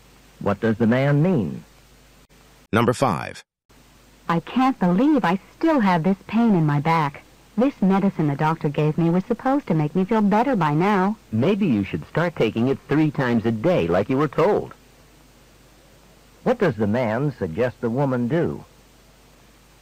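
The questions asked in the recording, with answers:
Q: What does the man suggest the woman do?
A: Take the medicine three times a day, as directed.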